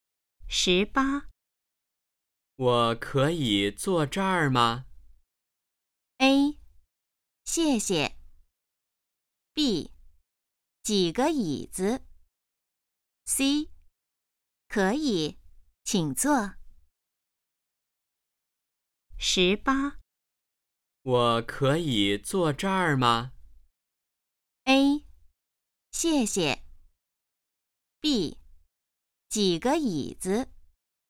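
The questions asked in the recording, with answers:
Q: 我可以坐这儿吗?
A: C: 可以,请坐。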